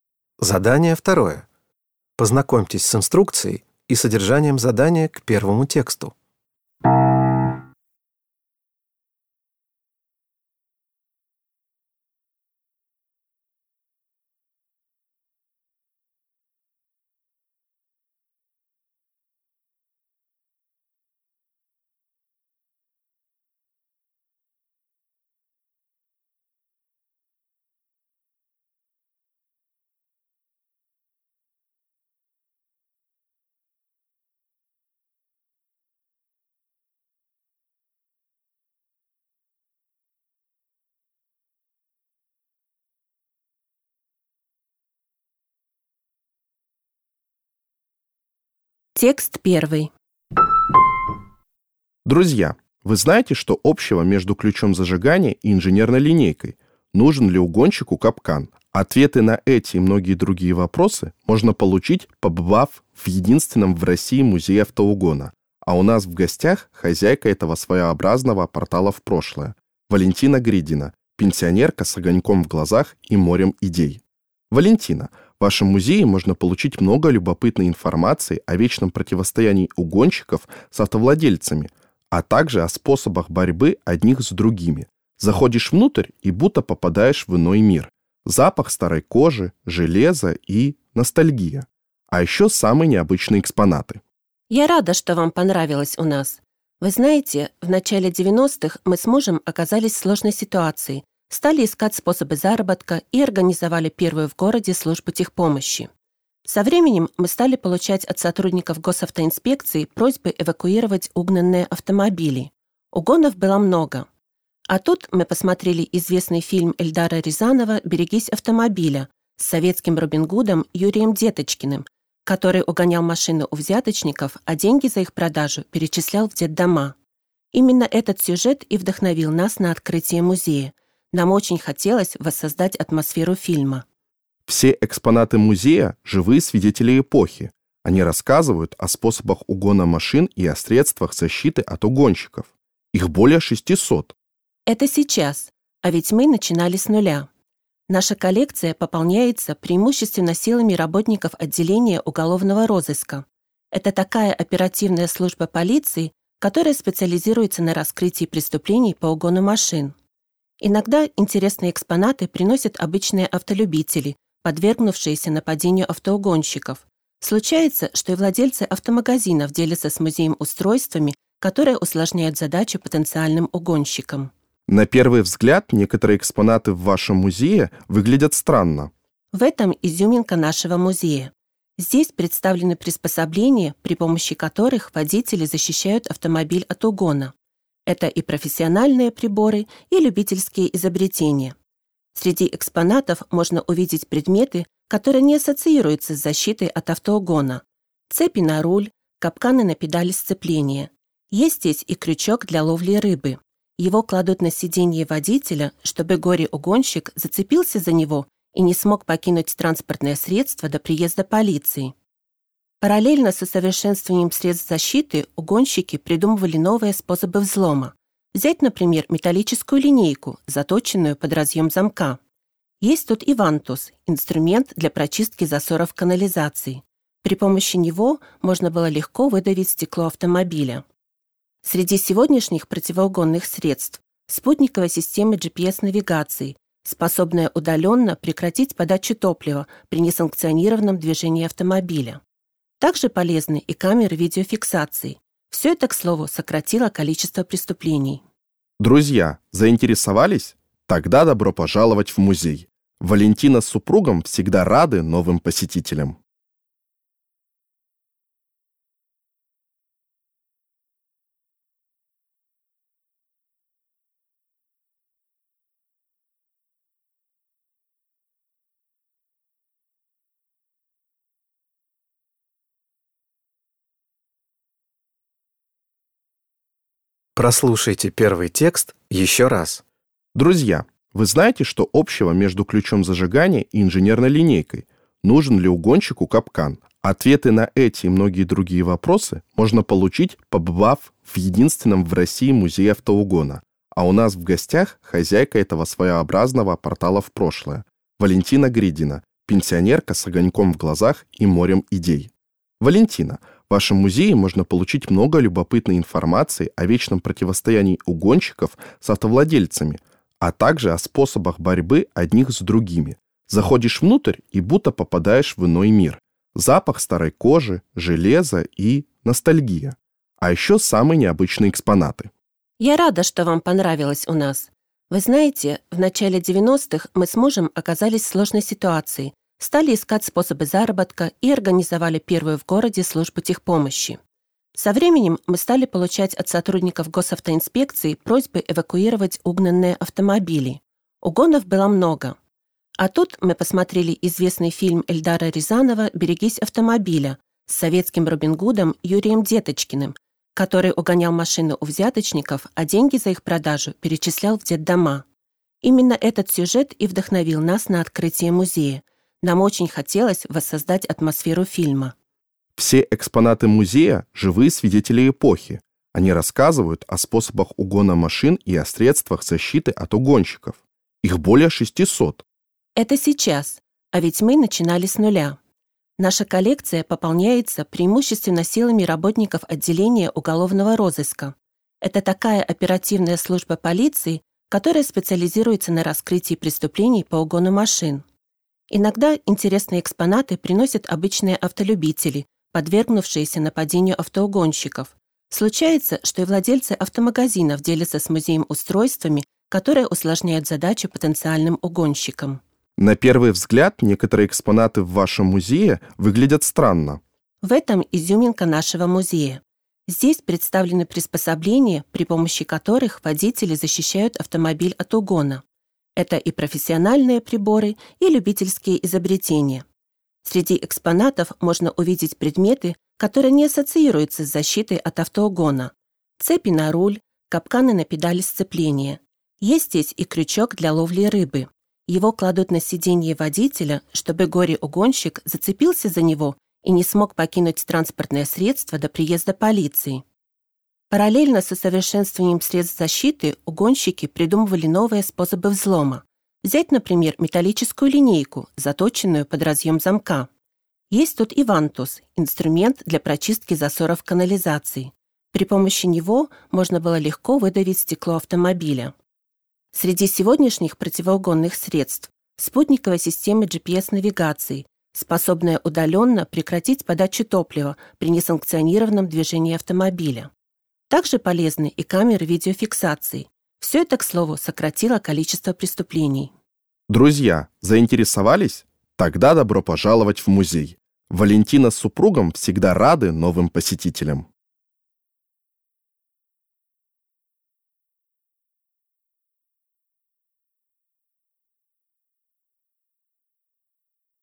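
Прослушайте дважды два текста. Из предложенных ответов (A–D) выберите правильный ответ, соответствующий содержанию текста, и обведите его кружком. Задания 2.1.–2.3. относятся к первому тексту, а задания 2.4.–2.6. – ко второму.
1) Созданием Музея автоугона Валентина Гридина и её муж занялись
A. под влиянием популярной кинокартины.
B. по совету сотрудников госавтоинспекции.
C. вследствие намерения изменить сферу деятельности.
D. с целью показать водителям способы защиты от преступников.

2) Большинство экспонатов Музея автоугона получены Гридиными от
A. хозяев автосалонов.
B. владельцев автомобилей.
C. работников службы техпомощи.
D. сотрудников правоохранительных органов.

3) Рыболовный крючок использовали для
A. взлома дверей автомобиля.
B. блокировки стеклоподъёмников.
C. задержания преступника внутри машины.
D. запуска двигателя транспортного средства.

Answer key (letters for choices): 1A, 2D, 3C

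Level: Poziom: dwujęzyczny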